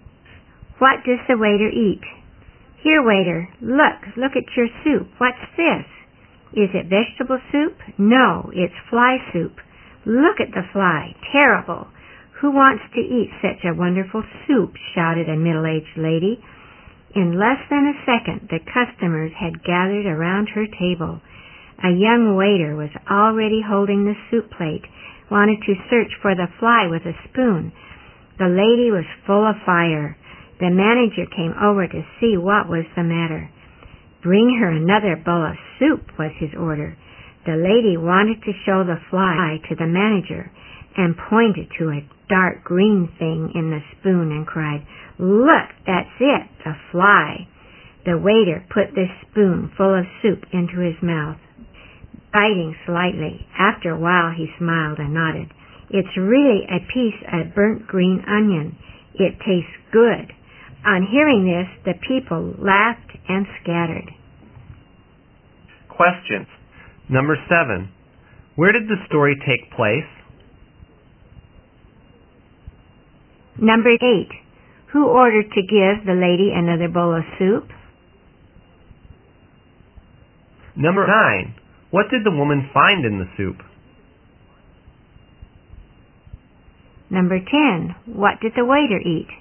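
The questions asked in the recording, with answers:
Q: Where did the story take place?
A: In a restaurant

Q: Who ordered to give the lady another bowl of soup?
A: The manager

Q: What did the waiter eat?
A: A piece of burnt green onion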